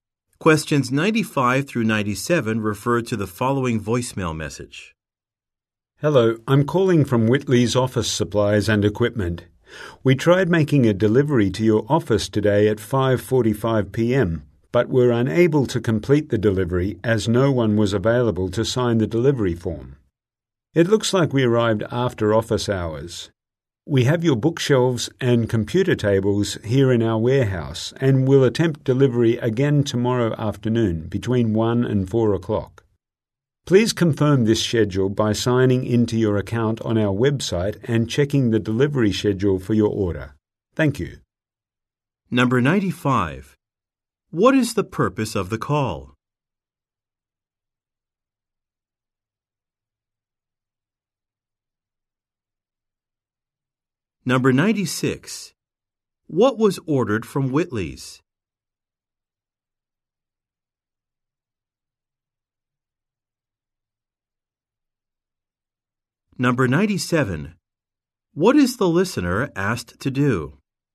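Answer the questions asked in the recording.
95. To reschedule a delivery that failed
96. Bookshelves and computer tables
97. Confirm the delivery schedule on the website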